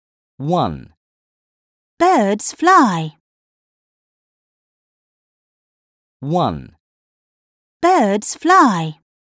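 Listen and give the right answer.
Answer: yes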